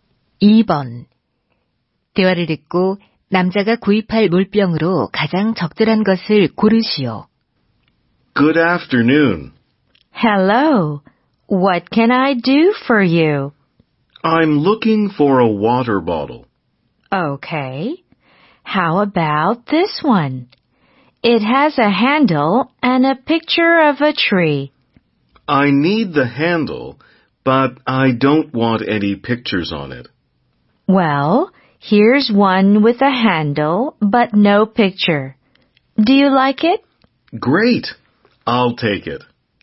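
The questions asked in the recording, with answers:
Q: 대화를 듣고 남자가 구입할 물병으로 가장 적절한 것을 고르시오.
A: 손잡이가 있고 그림이 없는 물병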